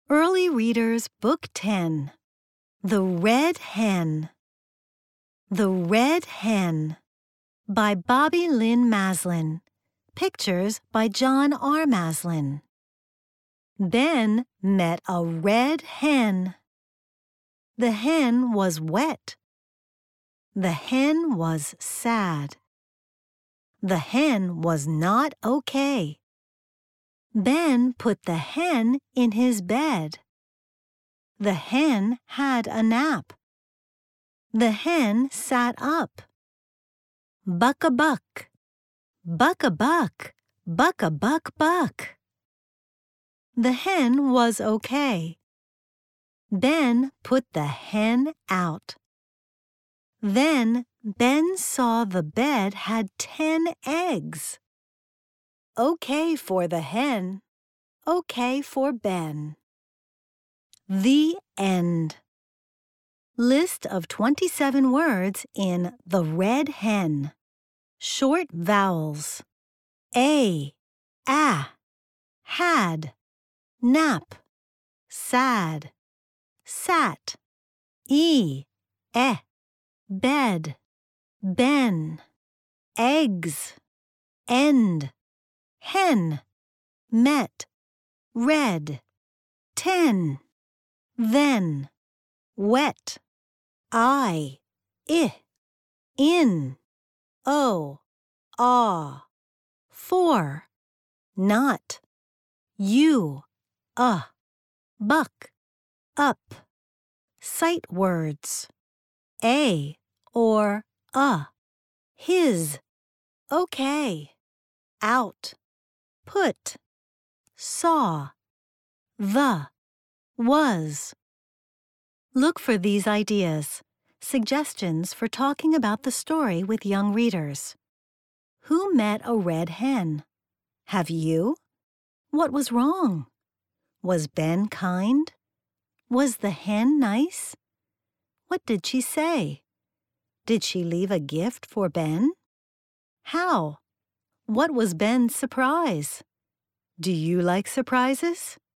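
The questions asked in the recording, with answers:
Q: Who met a red hen?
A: Ben

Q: What was wrong?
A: The hen was wet and sad

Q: Was Ben kind?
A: Yes

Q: What did she say?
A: Buck a buck

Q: Did she leave a gift for Ben?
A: Yes, ten eggs

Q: What was Ben's surprise?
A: The bed had 10 eggs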